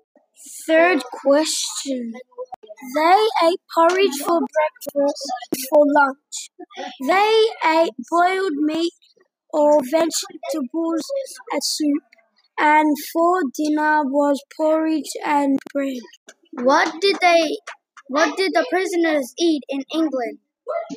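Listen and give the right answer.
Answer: Porridge for breakfast, boiled meat or vegetable soup for lunch, and porridge and bread for dinner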